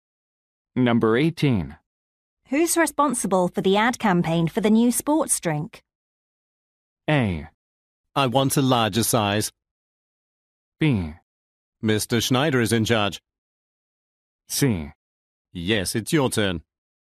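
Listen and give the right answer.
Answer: B: Mr. Schneider is in charge.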